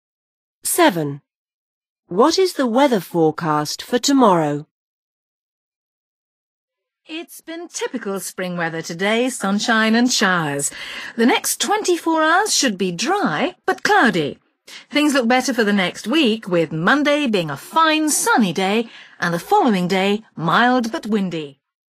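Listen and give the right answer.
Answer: dry but cloudy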